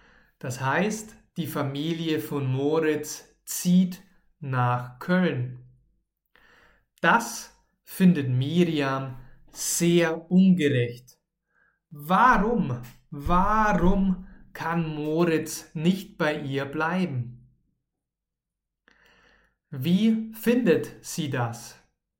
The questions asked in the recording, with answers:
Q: Wie findet sie das?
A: ja, ja, sehr ungerecht. Sie findet das sehr ungerecht.